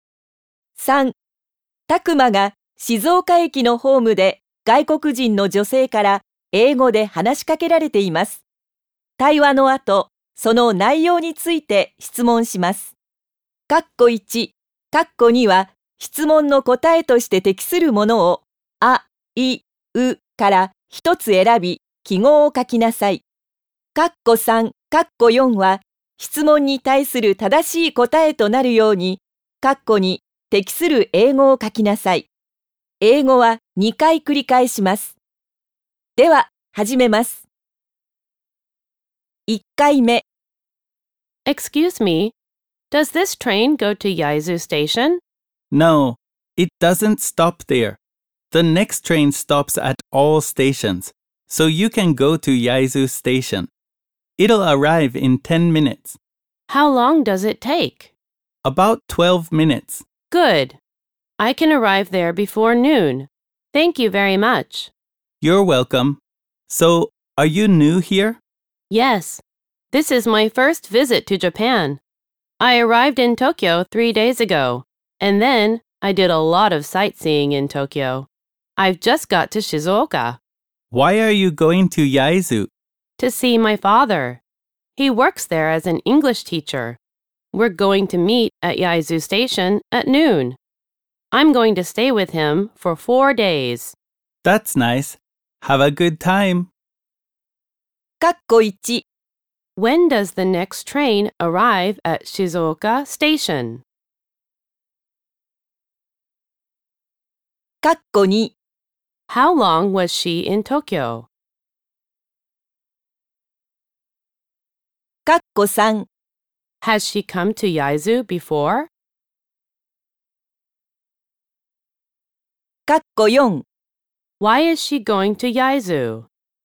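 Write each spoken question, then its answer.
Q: When does the next train arrive at Shizuoka Station?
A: In 10 minutes.

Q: How long was she in Tokyo?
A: For about three days.

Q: Has she come to Yaizu before?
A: No, she hasn't.

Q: Why is she going to Yaizu?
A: To see her father.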